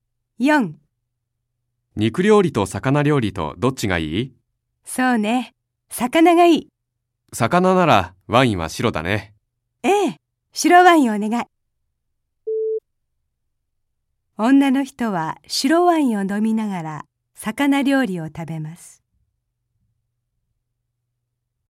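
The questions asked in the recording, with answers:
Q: 女の人は白ワインを飲みながら魚料理を食べます。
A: ○(正しい)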